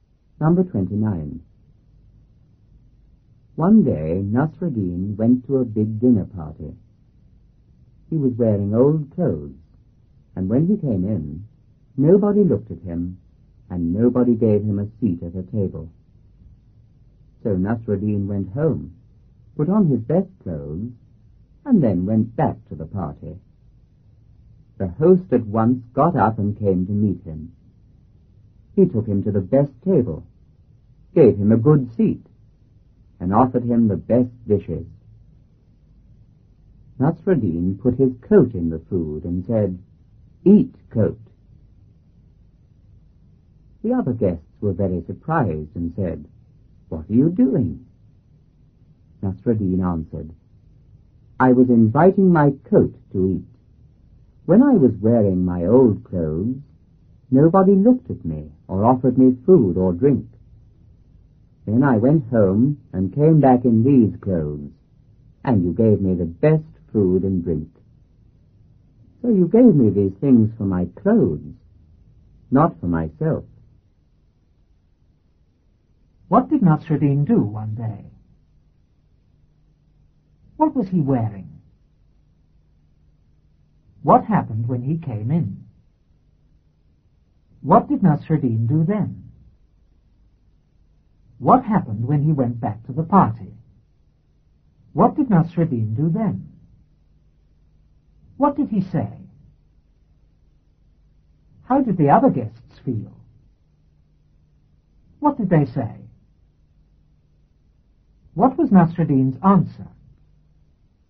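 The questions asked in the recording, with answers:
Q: What did Nasreddin do one day?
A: He went to a big dinner party.

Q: What was he wearing?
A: Old clothes.

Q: What happened when he came in?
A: Nobody looked at him and nobody gave him a seat at a table.

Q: What did Nasreddin do then?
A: He went home, put on his best clothes and went back to the party.

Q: What happened when he went back to the party?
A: The host came to meet him, took him to the best table, gave him a good seat and offered him the best dishes.

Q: What did Nasreddin do then?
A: He put his coat in the food.

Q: What did he say?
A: "Eat, coat."

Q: How did the other guests feel?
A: Very surprised.

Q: What did they say?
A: "What are you doing?"

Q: What was Nasreddin's answer?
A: He was inviting his coat to eat, because they gave him the food for his clothes, not for himself.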